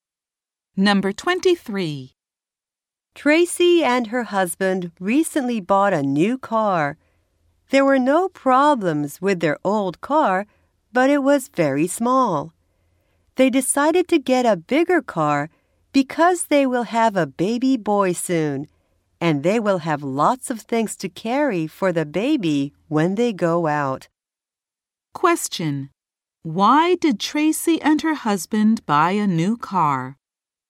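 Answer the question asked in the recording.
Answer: They needed a bigger car because they will have a baby soon.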